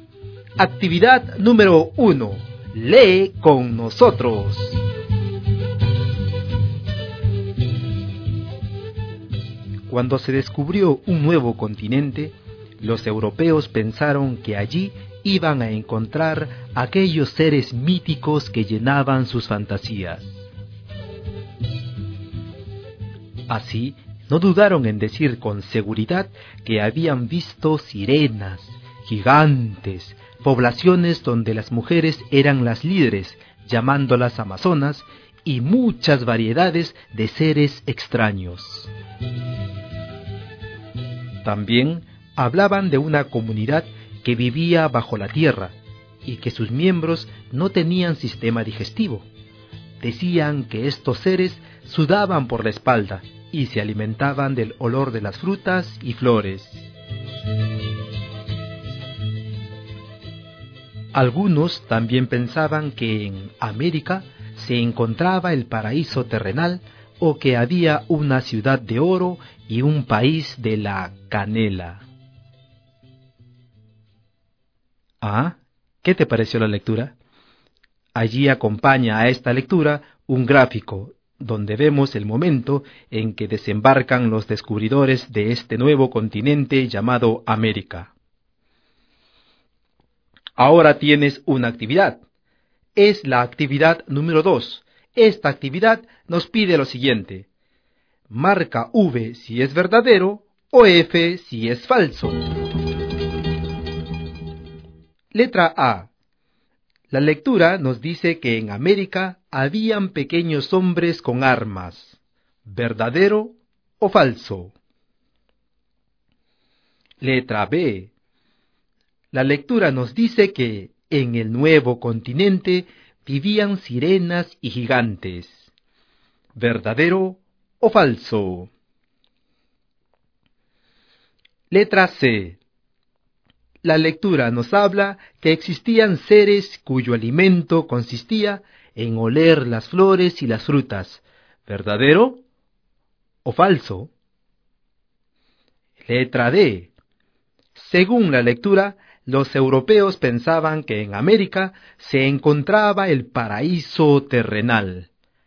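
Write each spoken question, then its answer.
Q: La lectura nos dice que en América habían pequeños hombres con armas. ¿Verdadero o falso?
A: Falso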